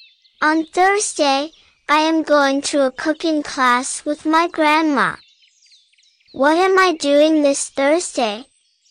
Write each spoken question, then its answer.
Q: What am I doing this Thursday?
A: I'm going to a cooking class.